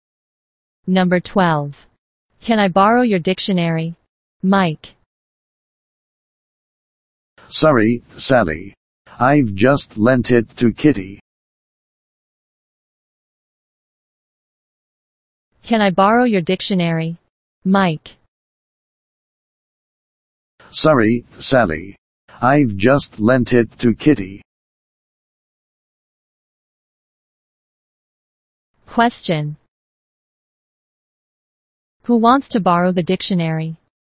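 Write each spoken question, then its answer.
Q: Who wants to borrow the dictionary?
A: Sally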